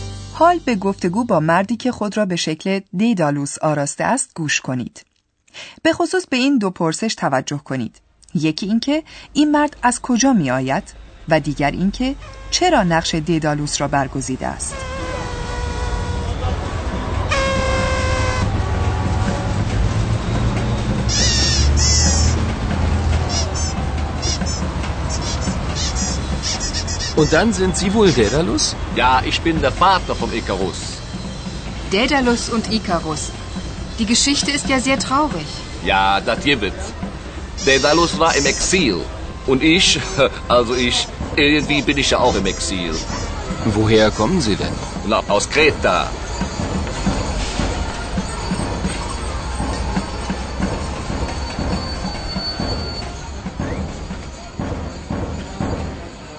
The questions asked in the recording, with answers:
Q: یکی اینکه این مرد از کجا می آید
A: این مرد دست کم به ادعای خودش از این جزیره می آید

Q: دیگر اینکه چرا نقش دیدالوس را برگزیده است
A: و حکایت مردی که لباس ددالوس را بر کرده نیز بر همین منوال است.